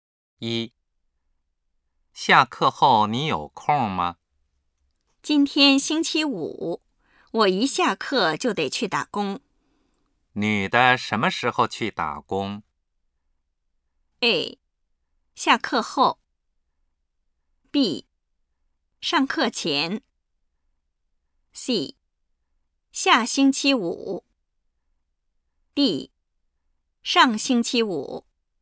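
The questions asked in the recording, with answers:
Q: 你的什么时候去打工?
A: A: 下课后。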